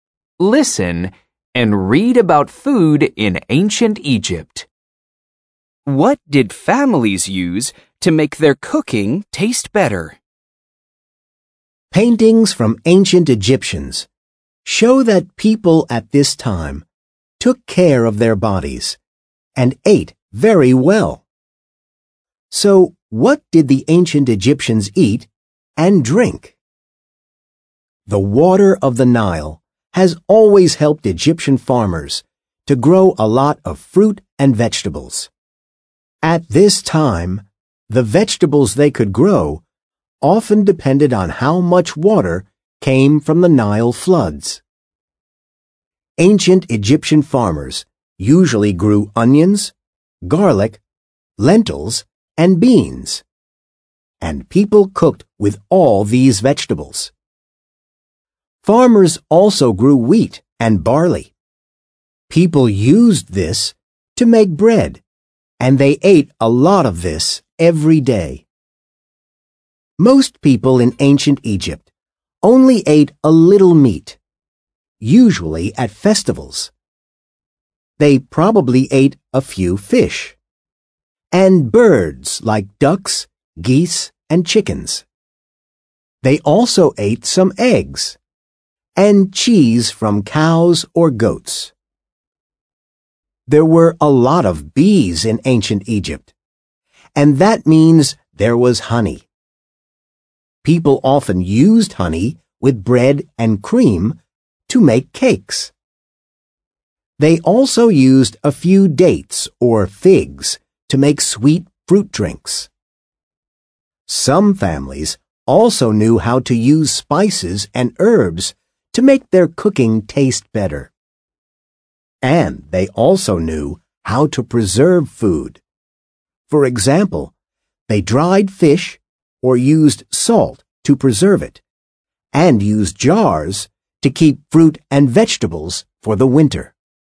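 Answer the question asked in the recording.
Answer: spices and herbs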